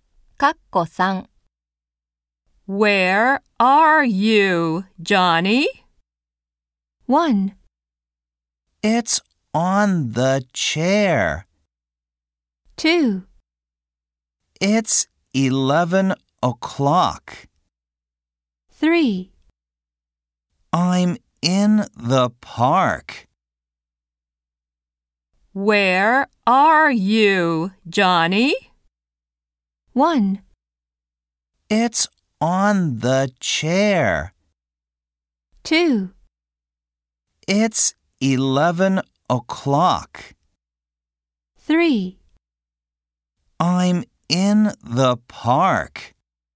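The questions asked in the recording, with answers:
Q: Where are you, Johnny?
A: 3: I'm in the park.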